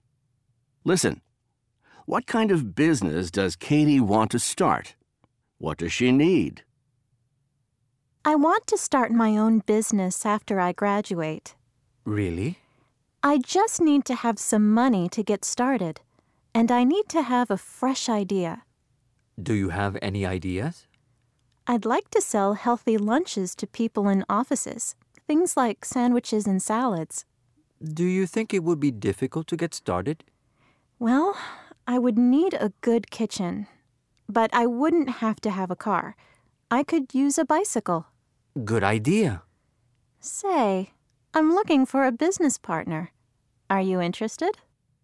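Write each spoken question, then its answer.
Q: What kind of business does Katie want to start?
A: Selling healthy lunches (sandwiches and salads) to people in offices

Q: What does she need?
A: Some money, a fresh idea, and a good kitchen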